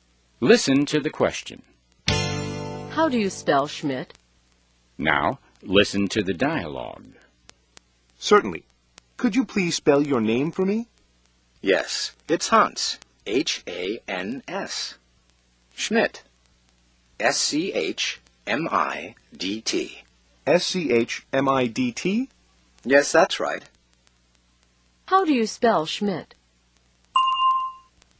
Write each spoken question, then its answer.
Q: How do you spell Schmidt?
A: S-C-H-M-I-D-T.